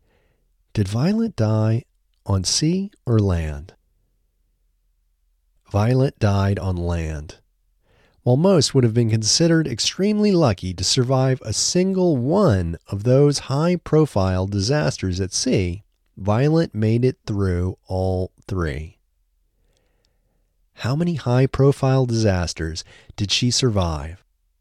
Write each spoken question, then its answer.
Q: How many high-profile disasters did she survive?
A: She survived three high-profile disasters.